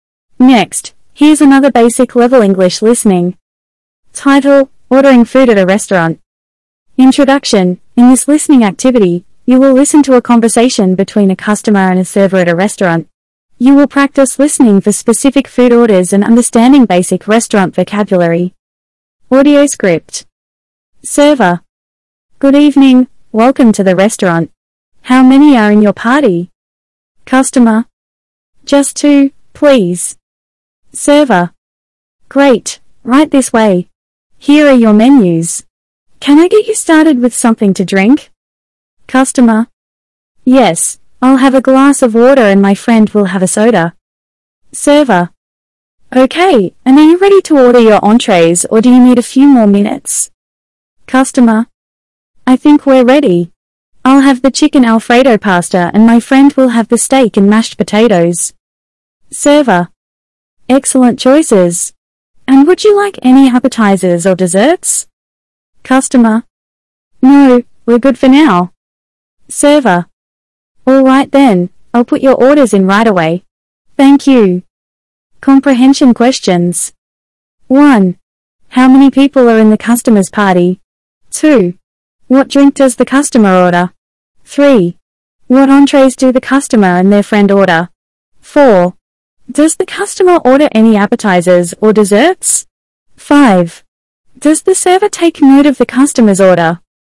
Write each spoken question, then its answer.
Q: How many people are in the customer's party?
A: There are two people in the customer's party.

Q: What drink does the customer order?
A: The customer orders a glass of water.

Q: What entrees do the customer and their friend order?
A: The customer orders the chicken alfredo pasta and their friend orders the steak and mashed potatoes.

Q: Does the customer order any appetizers or desserts?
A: No, the customer doesn't order any appetizers or desserts.